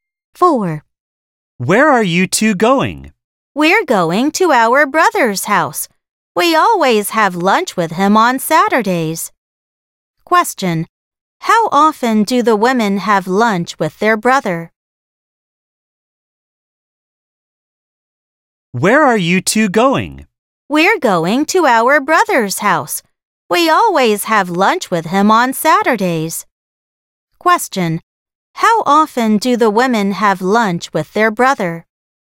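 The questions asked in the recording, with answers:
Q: How often do the women have lunch with their brother?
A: Every Saturday (once a week).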